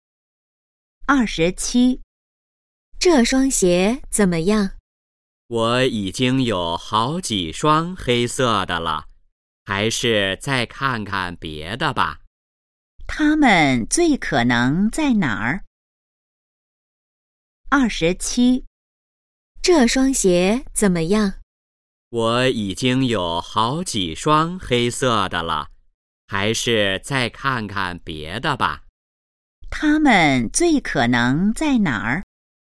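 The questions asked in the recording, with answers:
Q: 他们最可能在哪儿?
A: 鞋店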